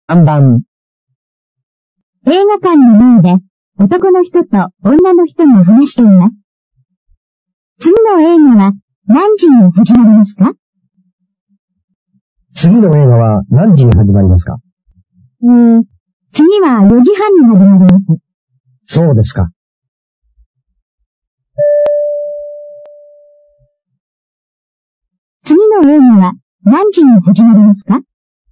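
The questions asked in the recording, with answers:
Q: 次の映画は何時に始まりますか?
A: 4時半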